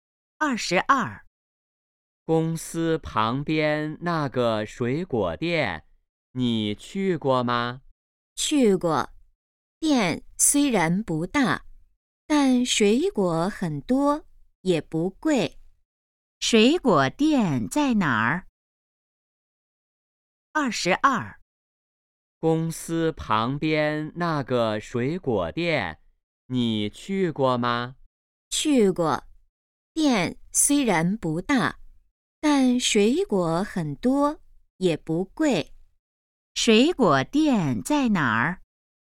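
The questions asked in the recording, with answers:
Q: 水果店在哪儿?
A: 公司旁边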